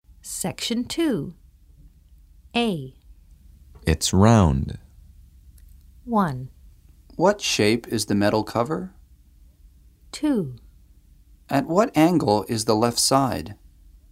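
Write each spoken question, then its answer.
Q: It's round.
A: 1: What shape is the metal cover?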